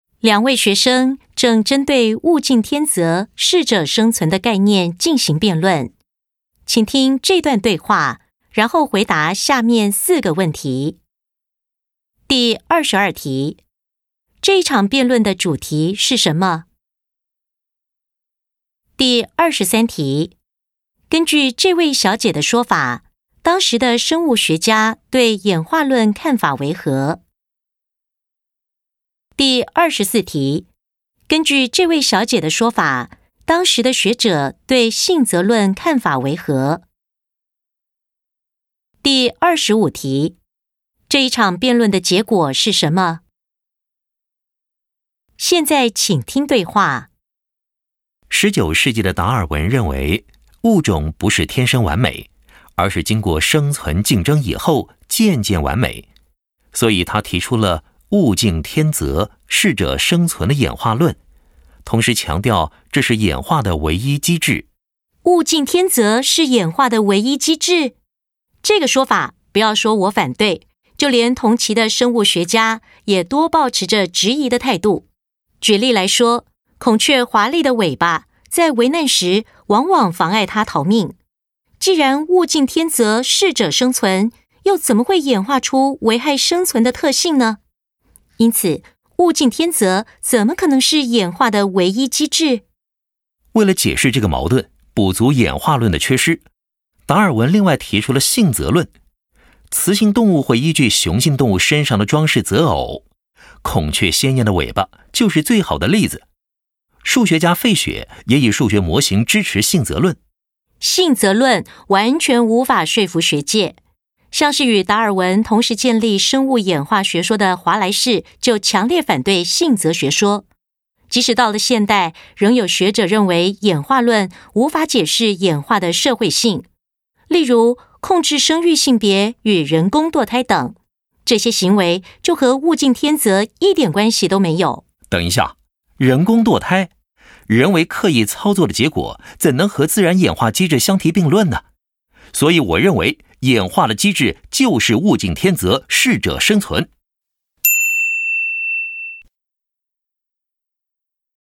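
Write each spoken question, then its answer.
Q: 这一场辩论的主题是什么?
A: 物竞天择、适者生存是否为演化的唯一机制

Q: 根据这位小姐的说法,当时的生物学家对演化论看法为何?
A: 多抱持质疑的态度

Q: 根据这位小姐的说法,当时的学者对性择论看法为何?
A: 完全无法说服学界,华莱士等人强烈反对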